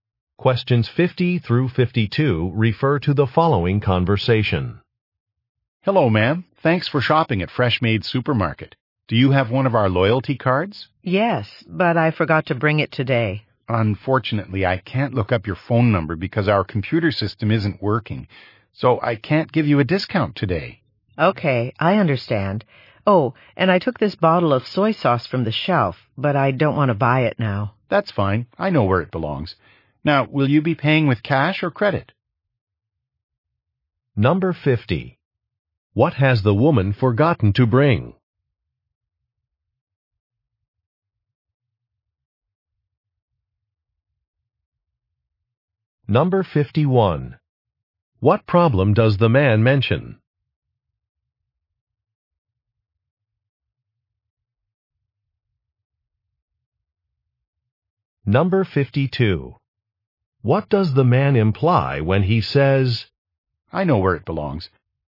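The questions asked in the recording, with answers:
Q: What has the woman forgotten to bring?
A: Her loyalty card

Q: What problem does the man mention?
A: The computer system isn't working

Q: What does the man imply when he says, I know where it belongs.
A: He will put the soy sauce back himself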